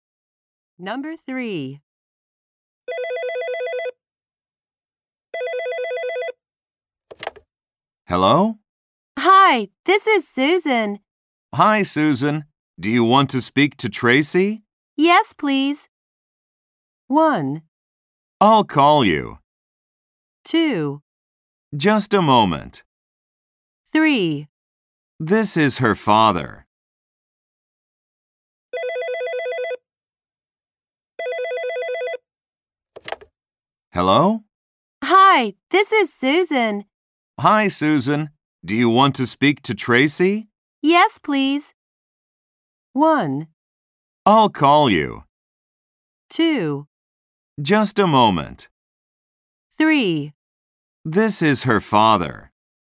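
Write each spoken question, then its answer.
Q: Hi, Susan. Do you want to speak to Tracy?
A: 2: Just a moment.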